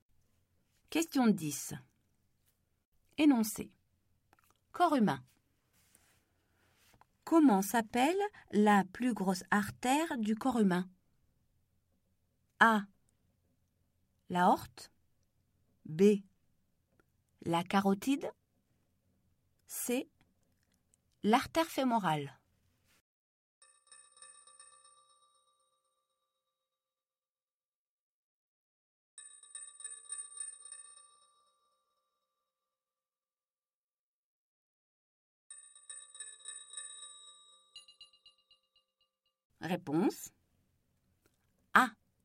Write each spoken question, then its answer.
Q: Comment s'appelle la plus grosse artère du corps humain?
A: Réponse. A. L'aorte.